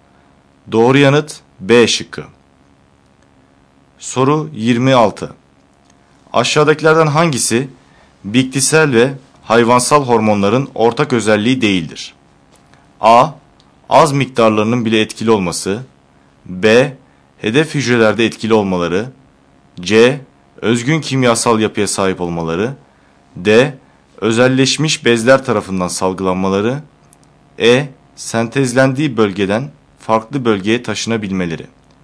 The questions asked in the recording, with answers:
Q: Aşağıdakilerden hangisi bitkisel ve hayvansal hormonların ortak özelliği değildir?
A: Doğru yanıt D şıkkı.